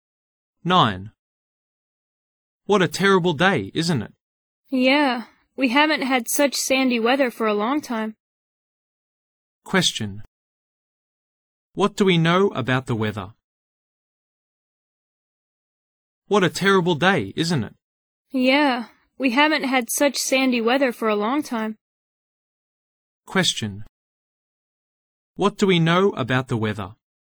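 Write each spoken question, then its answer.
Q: What do we know about the weather?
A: It is very sandy; they haven't had such sandy weather for a long time.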